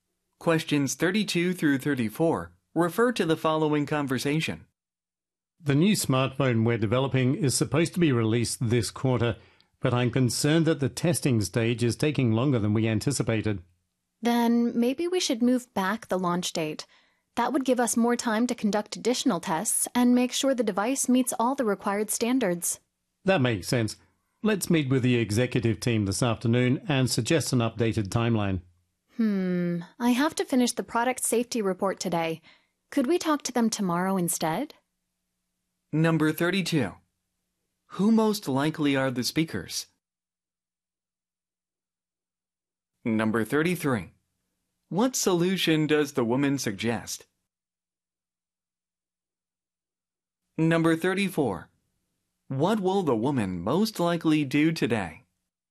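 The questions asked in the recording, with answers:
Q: Who most likely are the speakers?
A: People who develop smartphones (product developers)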